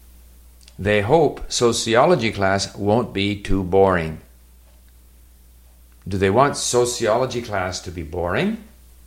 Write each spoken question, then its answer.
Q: Do they want sociology class to be boring?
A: No, of course not. They hope sociology class won't be too boring.